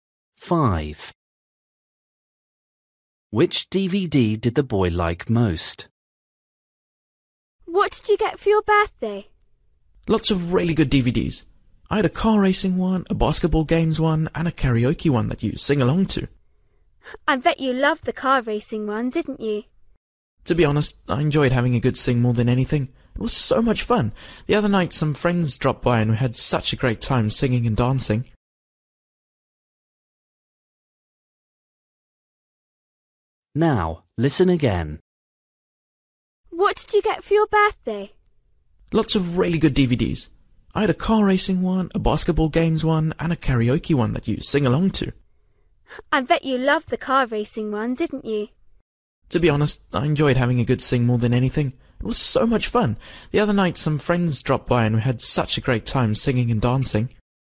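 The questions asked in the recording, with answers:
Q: Which DVD did the boy like most?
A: the karaoke one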